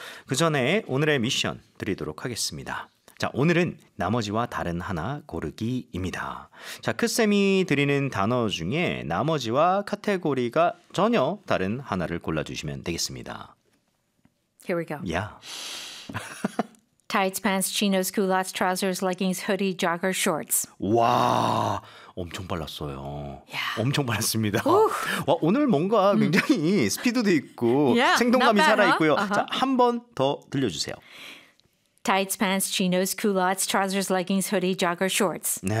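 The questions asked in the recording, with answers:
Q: 자, 오늘은 나머지와 다른 하나 고르기입니다.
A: hoodie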